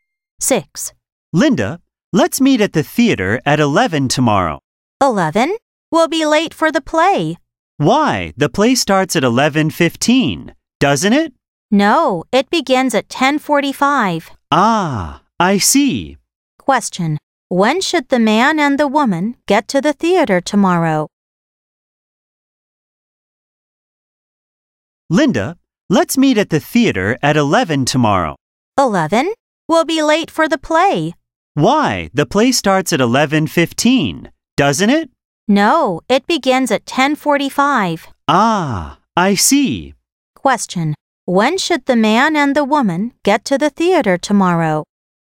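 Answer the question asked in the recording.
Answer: Before 10:45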